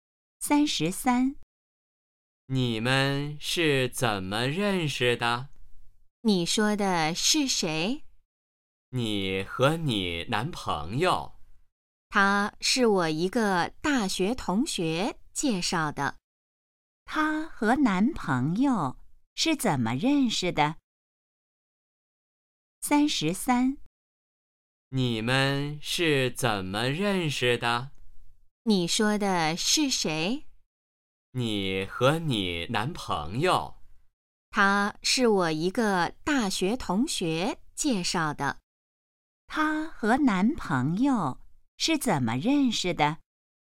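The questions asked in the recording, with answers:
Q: 他和男朋友是怎么认识的?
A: 大学同学介绍的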